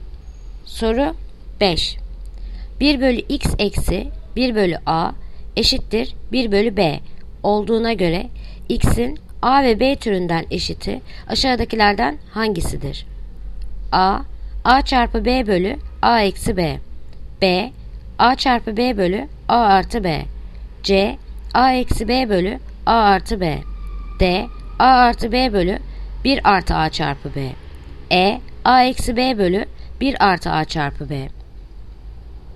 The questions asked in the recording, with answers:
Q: 1 bölü x eksi 1 bölü a eşittir 1 bölü b olduğuna göre x'in a ve b türünden eşiti aşağıdakilerden hangisidir?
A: Yanıt Bursa. A çarpı B bölü A artı B.